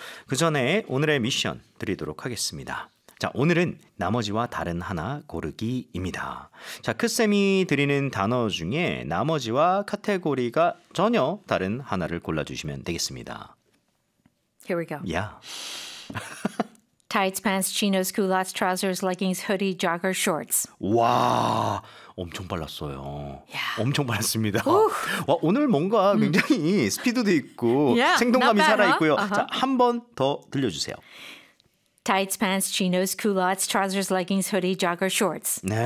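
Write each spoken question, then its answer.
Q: 자, 크쌤이 드리는 단어 중에 나머지와 카테고리가 전혀 다른 하나를 골라주시면 되겠습니다.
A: hoodie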